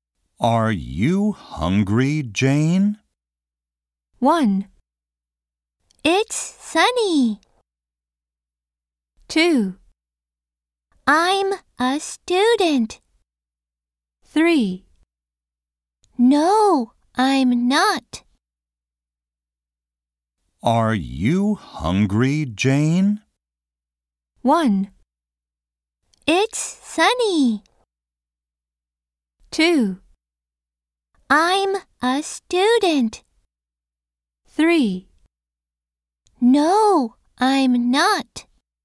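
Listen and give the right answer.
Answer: 3: No, I'm not.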